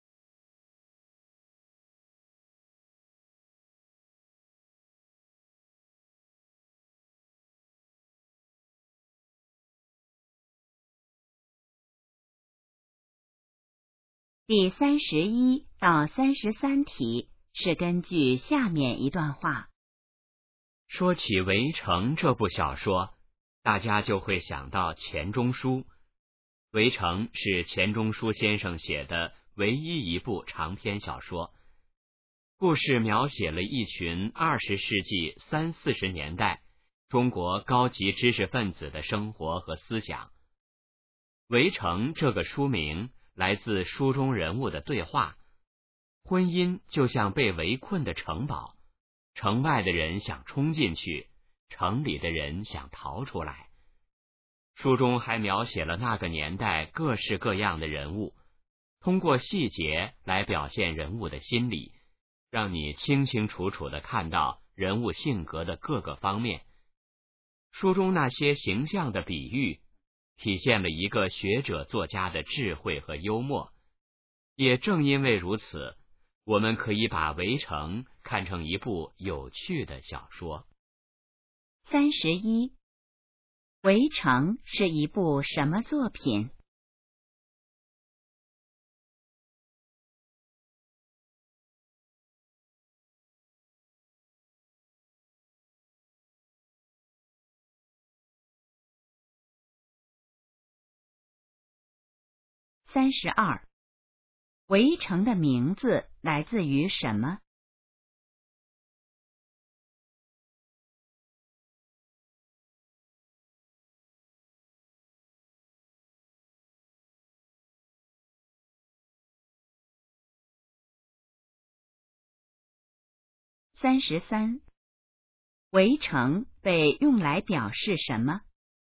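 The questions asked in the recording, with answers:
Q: 《围城》是一部什么作品?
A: 长篇小说

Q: 《围城》的名字来自于什么?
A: 书中人物的对话

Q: 《围城》被用来表示什么?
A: 婚姻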